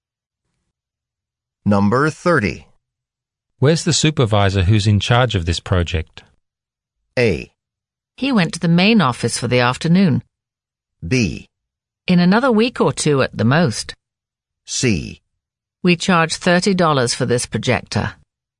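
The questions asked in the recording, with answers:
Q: Where's the supervisor who's in charge of this project?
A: A: He went to the main office for the afternoon.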